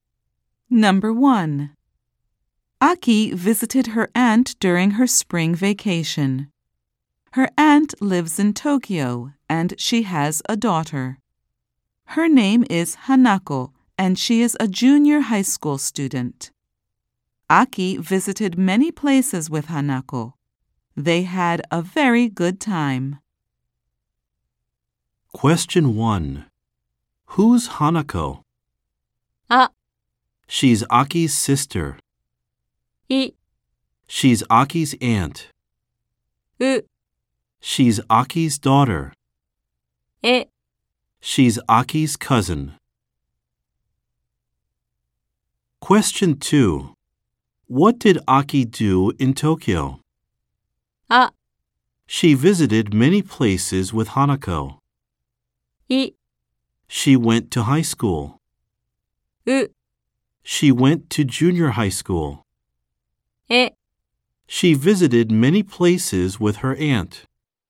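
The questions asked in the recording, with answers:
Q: Who's Hanako?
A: え: She's Aki's cousin.

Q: What did Aki do in Tokyo?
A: あ: She visited many places with Hanako.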